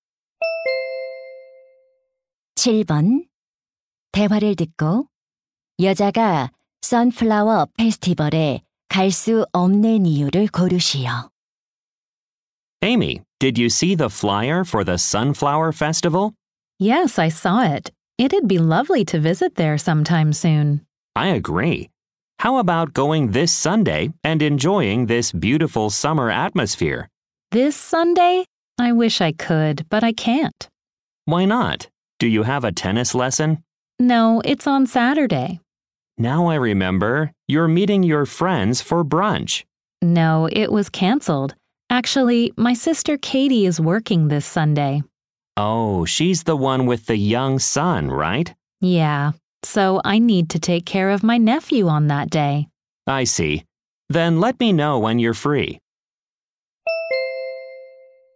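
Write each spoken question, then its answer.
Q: 대화를 듣고 여자가 선플라워 페스티벌에 갈 수 없는 이유를 고르시오.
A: 조카를 돌봐야 해서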